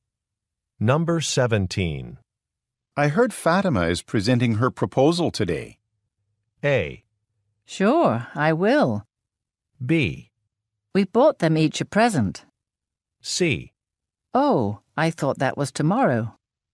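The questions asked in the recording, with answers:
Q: I heard Fatima is presenting her proposal today.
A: C: Oh, I thought that was tomorrow.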